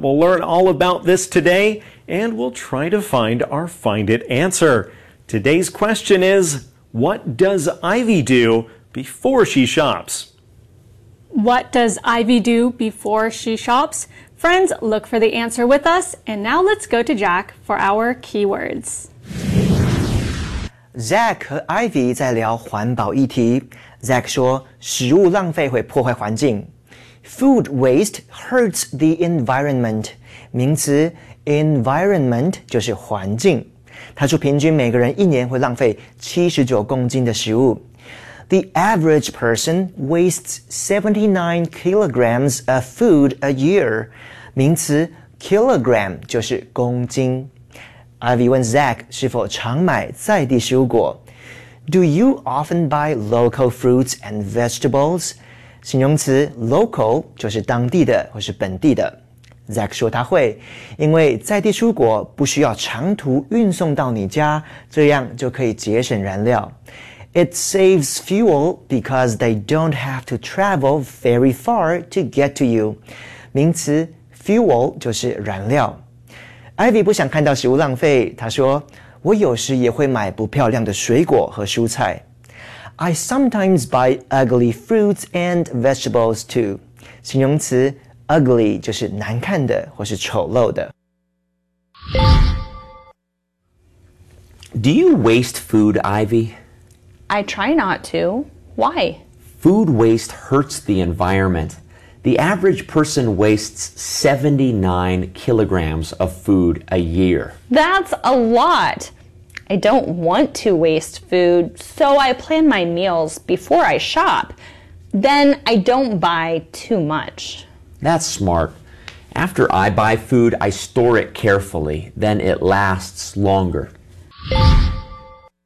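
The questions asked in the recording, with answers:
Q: What does Ivy do before she shops?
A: She plans her meals.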